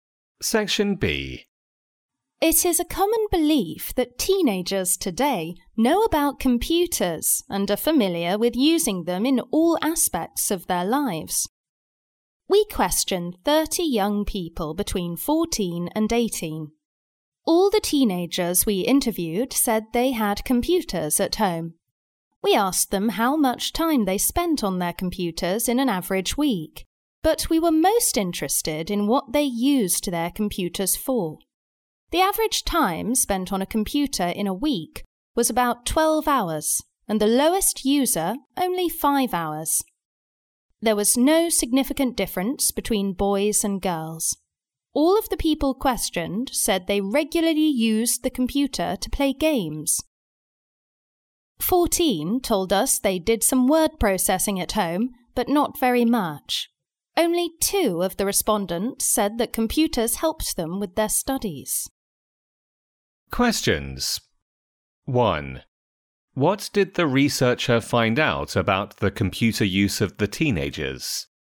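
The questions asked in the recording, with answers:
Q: What did the researcher find out about the computer use of the teenagers?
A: All had computers at home, spent about 12 hours a week on them on average, and used them mainly to play games; few used them for study.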